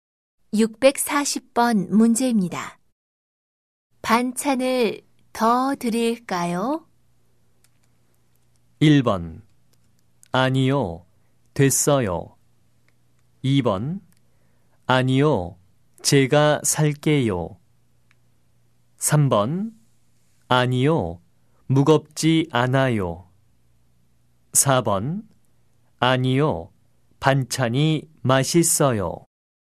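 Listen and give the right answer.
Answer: 1: 아니요, 됐어요.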